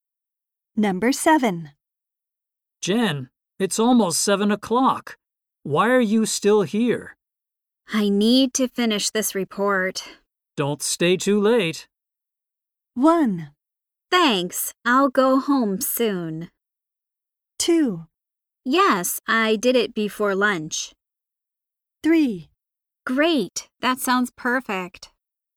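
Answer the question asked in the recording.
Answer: 1: Thanks, I'll go home soon.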